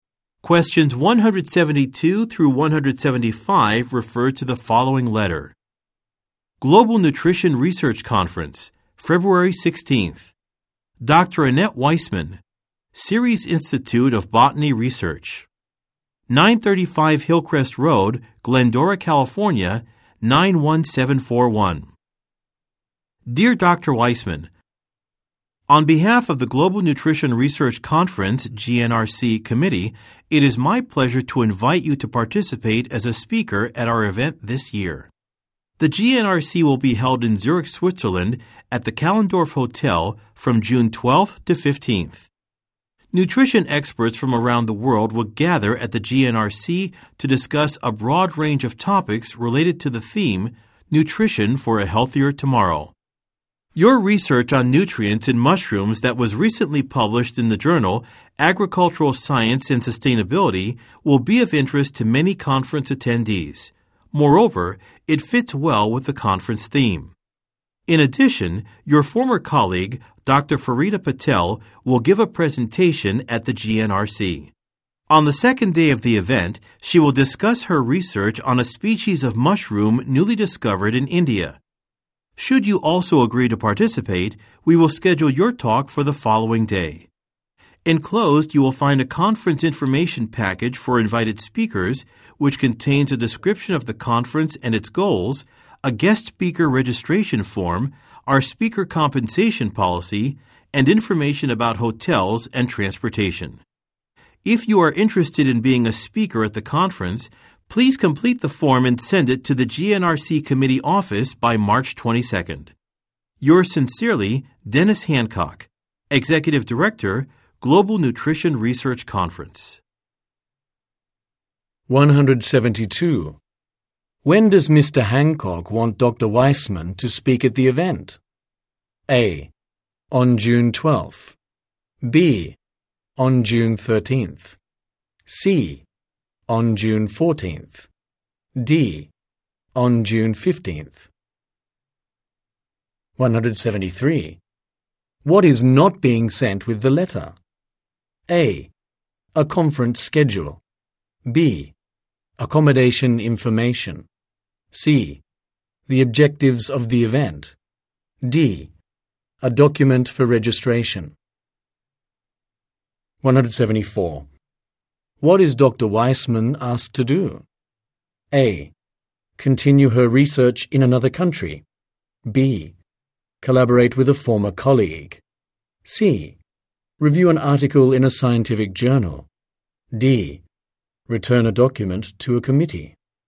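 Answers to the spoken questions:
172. C: On June 14th.
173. A: A conference schedule.
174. D: Return a document to a committee.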